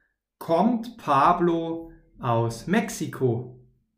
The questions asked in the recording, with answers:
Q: Kommt Pablo aus Mexiko?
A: Ja, das stimmt. Er kommt aus Mexiko.